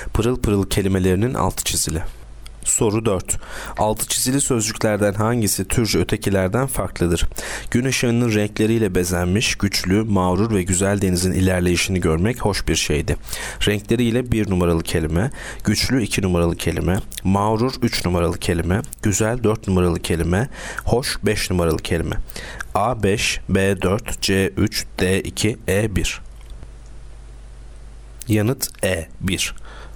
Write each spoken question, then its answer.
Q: Altı çizili sözcüklerden hangisi türcü ötekilerden farklıdır?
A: Yanıt E 1.